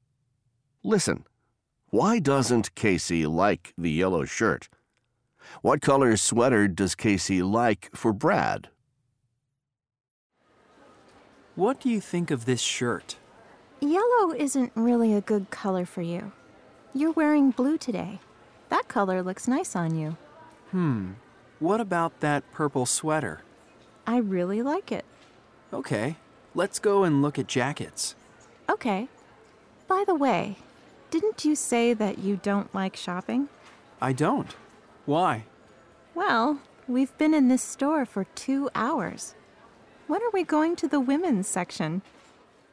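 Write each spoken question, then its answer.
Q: Why doesn't Casey like the yellow shirt?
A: Yellow isn't really a good color for Brad.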